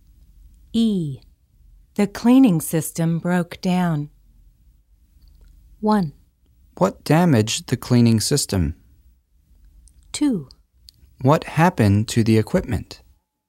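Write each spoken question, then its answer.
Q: The cleaning system broke down.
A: 2: What happened to the equipment?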